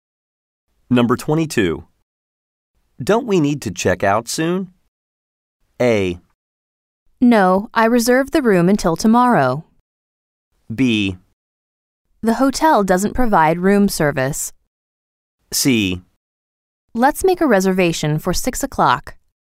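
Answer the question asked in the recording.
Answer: A: No, I reserved the room until tomorrow.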